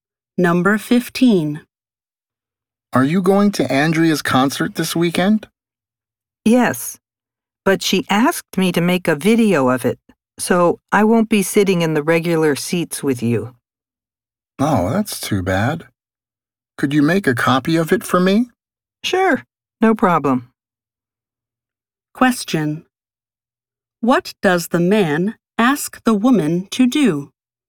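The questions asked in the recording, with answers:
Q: What does the man ask the woman to do?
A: Make a copy of the concert video for him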